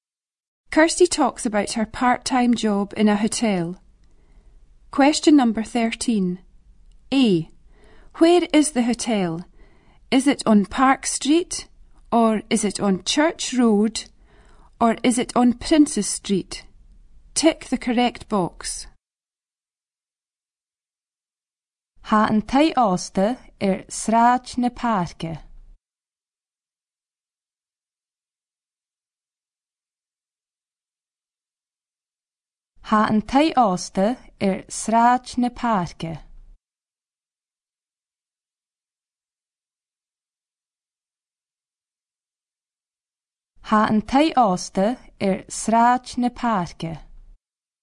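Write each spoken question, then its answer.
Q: Where is the hotel?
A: Park Street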